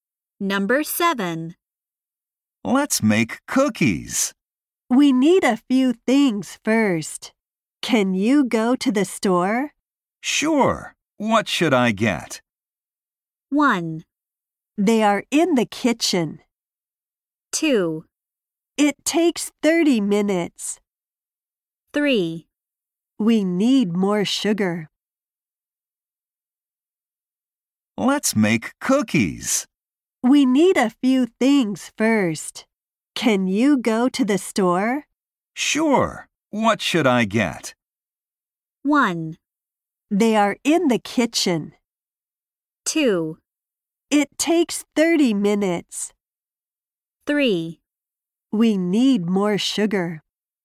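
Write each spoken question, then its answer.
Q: Sure. What should I get?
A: 3: We need more sugar.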